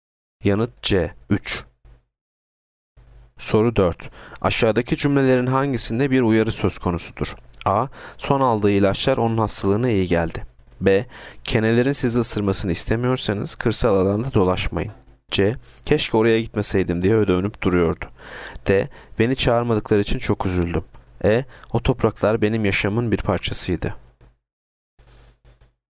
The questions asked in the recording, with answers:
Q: Aşağıdaki cümlelerin hangisinde bir uyarı söz konusudur?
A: Yanıt B. Kenelerin sizi ısırmasını istemiyorsanız kırsal alanda dolaşmayın.